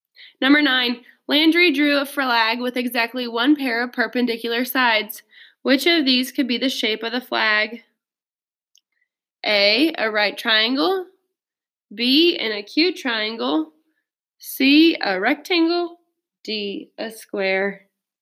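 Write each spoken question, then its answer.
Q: Which of these could be the shape of the flag?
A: A: A right triangle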